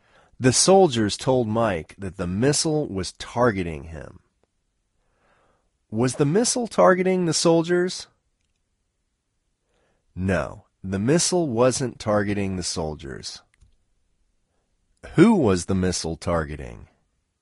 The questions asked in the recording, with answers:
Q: Who was the missile targeting?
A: The missile was targeting Mike.